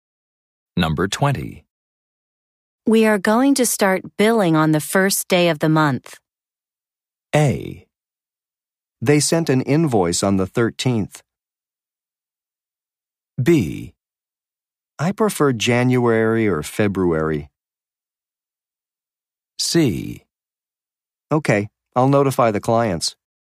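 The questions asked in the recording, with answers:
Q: We are going to start billing on the first day of the month.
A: C: Okay, I'll notify the clients.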